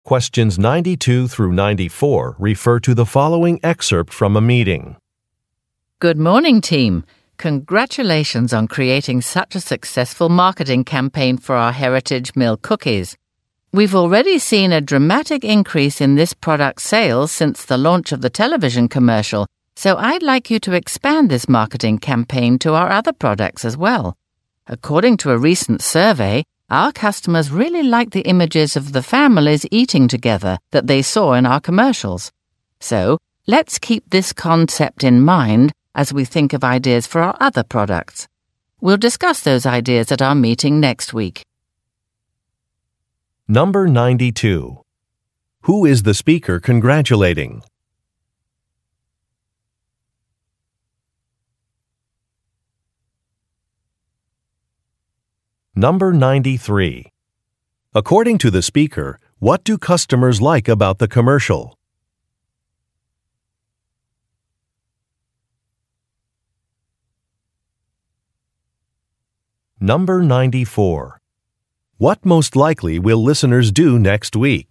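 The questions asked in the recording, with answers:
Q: Who is the speaker congratulating?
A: The team that created the Heritage Mill cookies marketing campaign

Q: According to the speaker, what do customers like about the commercial?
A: The images of families eating together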